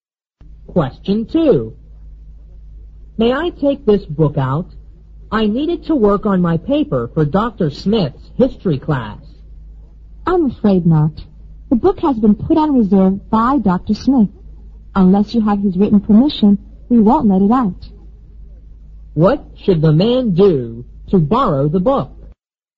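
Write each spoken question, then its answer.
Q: What should the man do to borrow the book?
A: Get Dr. Smith's written permission.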